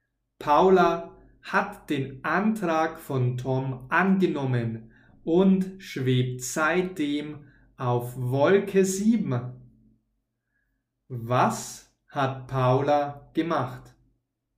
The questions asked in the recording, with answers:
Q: Was hat Paula gemacht?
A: Sie hat den Antrag angenommen.